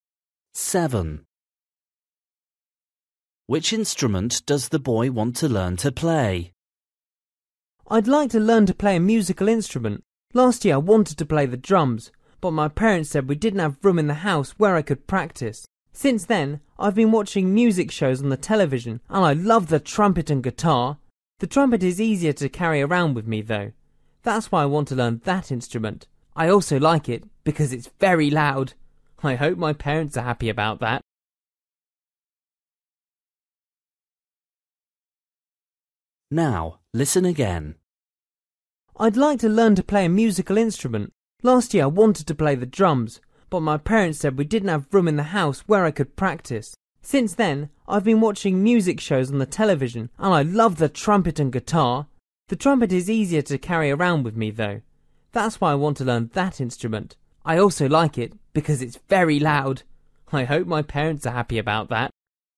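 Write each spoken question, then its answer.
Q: Which instrument does the boy want to learn to play?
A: The trumpet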